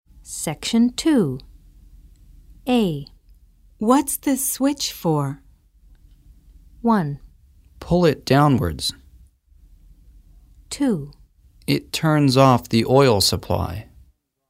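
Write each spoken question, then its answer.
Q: What's the switch for?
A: 2: It turns off the oil supply.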